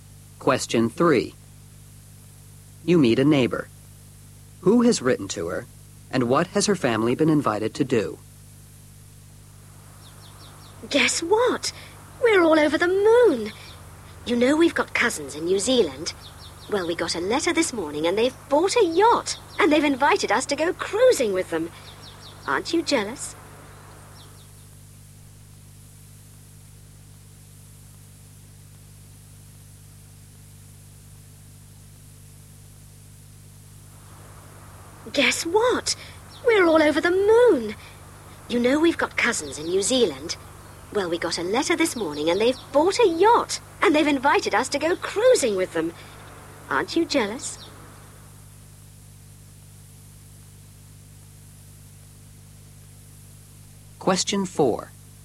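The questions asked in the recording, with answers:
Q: Who has written to her? And what has her family been invited to do?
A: Her cousins in New Zealand; to go cruising on their yacht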